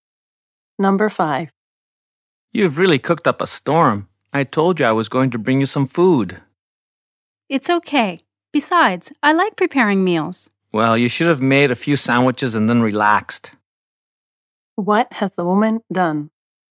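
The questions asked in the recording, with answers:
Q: What has the woman done?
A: She has cooked a lot of food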